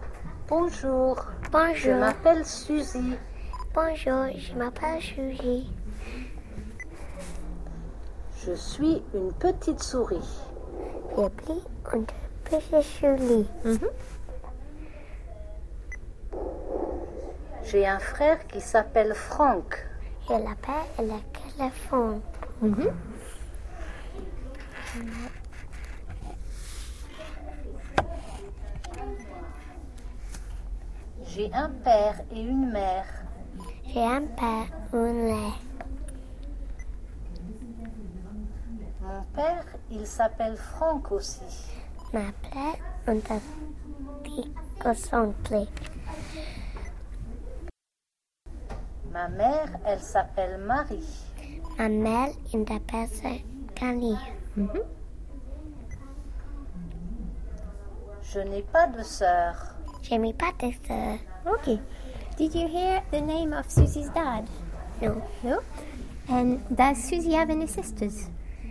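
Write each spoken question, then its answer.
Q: Did you hear the name of Susie's dad?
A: Yes, Franck

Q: And does Susie have any sisters?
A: No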